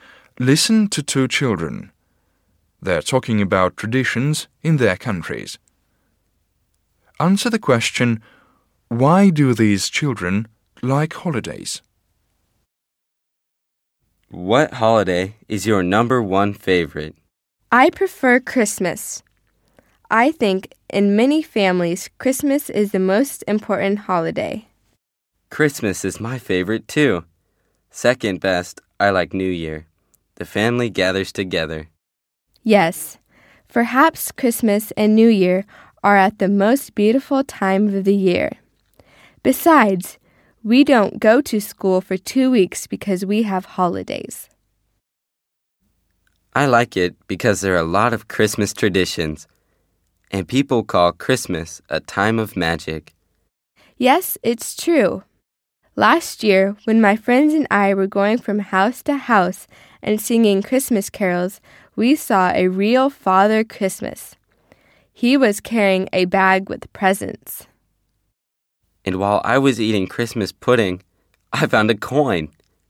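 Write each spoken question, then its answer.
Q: why do these children like holidays?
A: Families gather together, it's a beautiful time of year, there's no school for 2 weeks, and there are many traditions and magic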